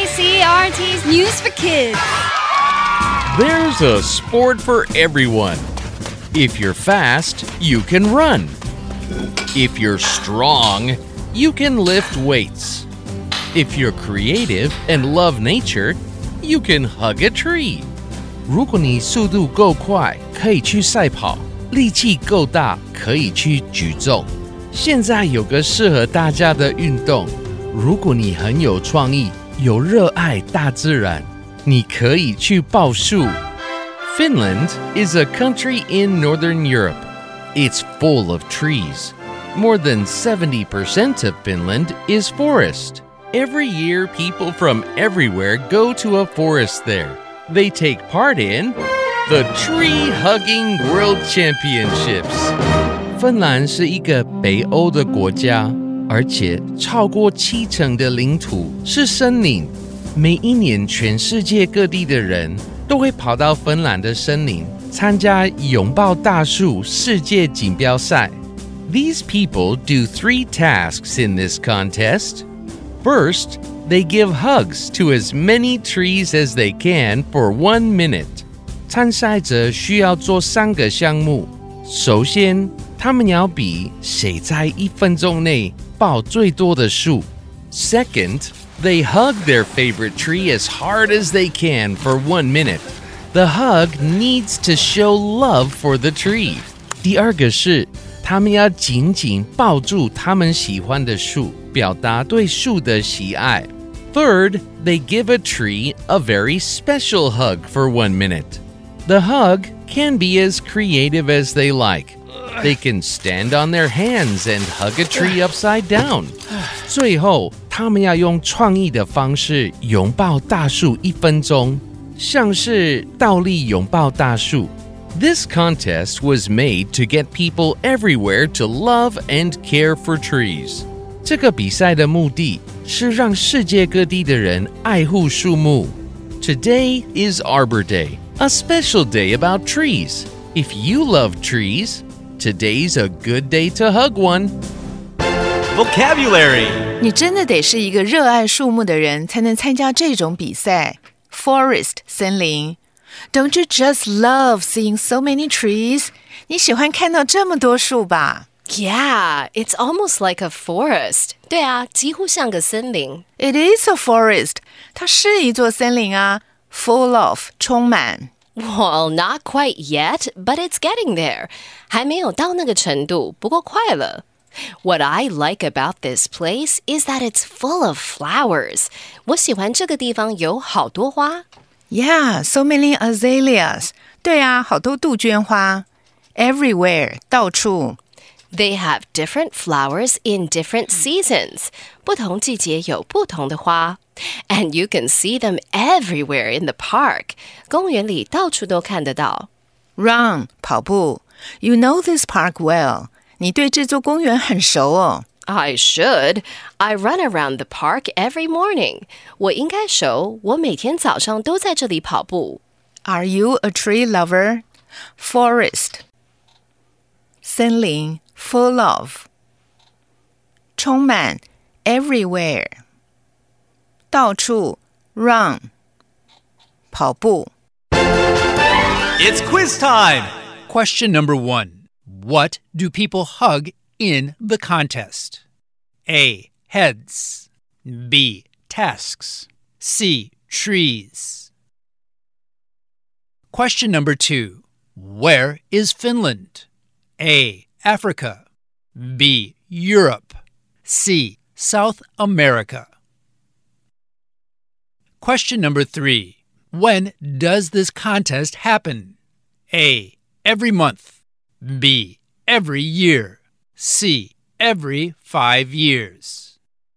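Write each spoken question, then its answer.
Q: What do people hug in the contest?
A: C: Trees.

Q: Where is Finland?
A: B: Europe.

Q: When does this contest happen?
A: B: Every year.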